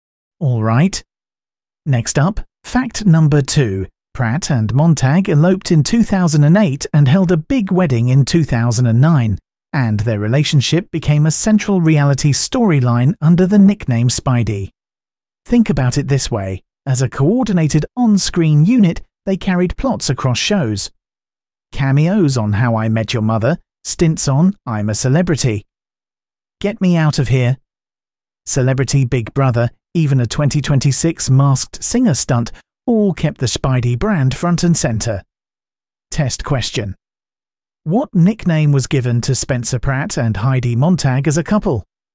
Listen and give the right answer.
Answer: Correct answer. Spidey.